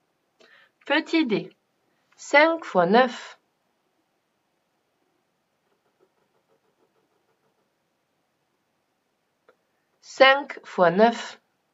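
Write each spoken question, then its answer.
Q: 5 fois 9.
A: 45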